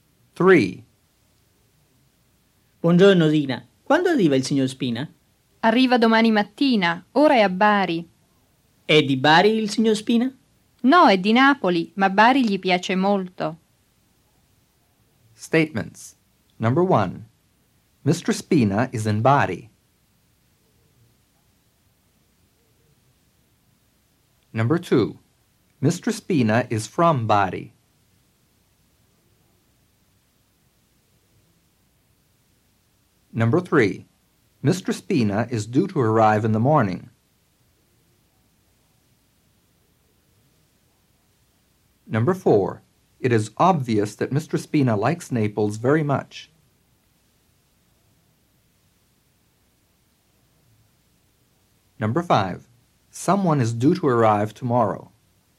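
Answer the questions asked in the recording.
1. True
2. False
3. True
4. False
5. True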